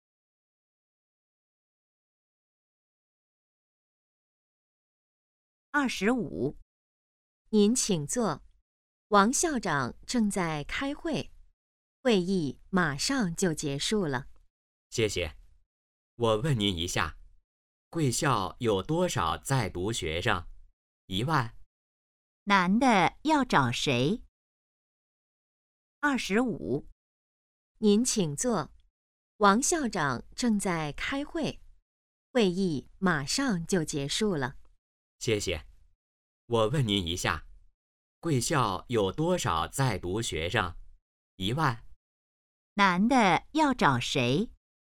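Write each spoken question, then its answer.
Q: 男的要找谁?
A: 王校长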